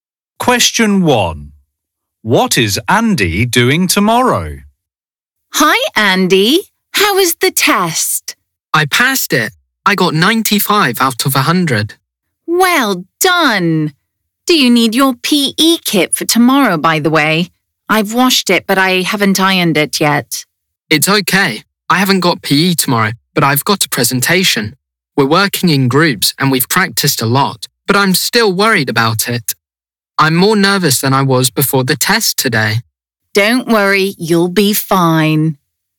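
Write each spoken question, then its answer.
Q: What is Andy doing tomorrow?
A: giving a presentation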